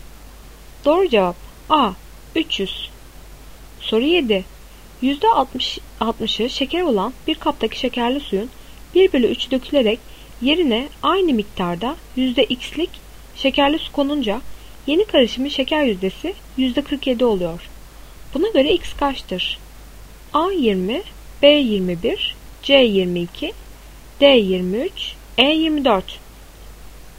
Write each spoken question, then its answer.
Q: Buna göre x kaçtır?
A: Doğru cevap B 21.